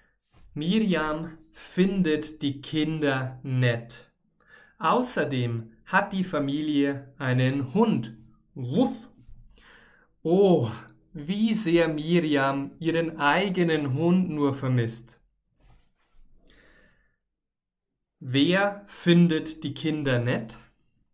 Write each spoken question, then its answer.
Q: Wer findet die Kinder nett?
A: Miriam, genau. Miriam findet die Kinder nett.